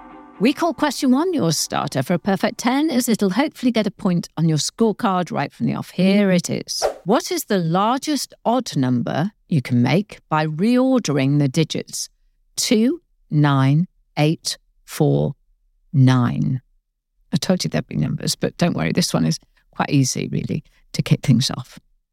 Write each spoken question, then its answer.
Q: What is the largest odd number you can make by reordering the digits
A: 98,429.